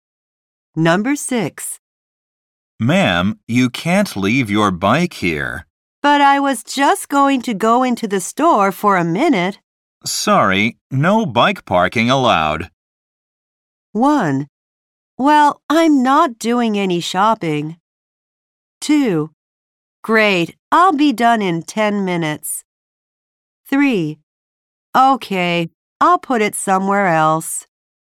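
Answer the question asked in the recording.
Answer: 3: Okay, I'll put it somewhere else.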